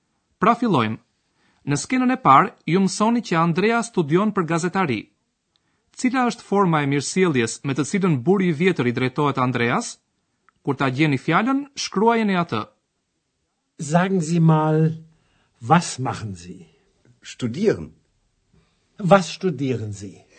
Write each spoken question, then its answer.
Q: Cila është forma e mirësjelljes me të cilën buri i vjetër i drejtohet Andreas?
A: Në gjermanisht kjo është fjala zi.